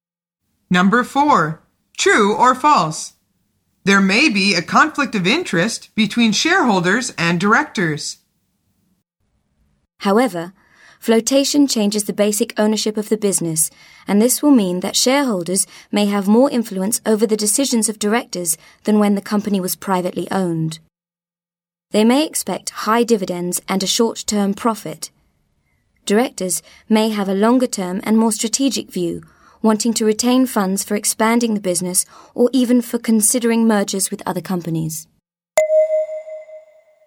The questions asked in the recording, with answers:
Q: True or false? There may be a conflict of interest between shareholders and directors.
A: The answer is true.